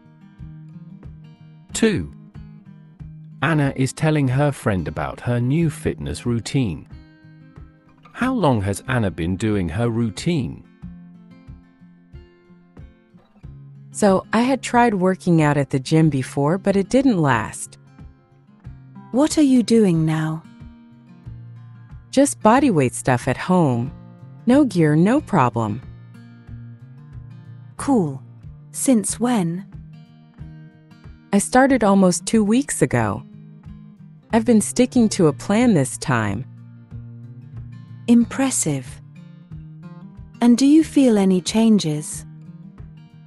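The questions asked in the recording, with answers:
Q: How long has Anna been doing her routine?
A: Almost 2 weeks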